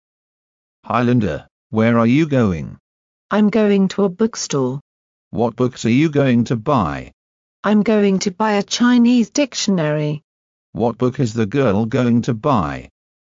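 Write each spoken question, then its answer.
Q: What book is the girl going to buy?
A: A Chinese dictionary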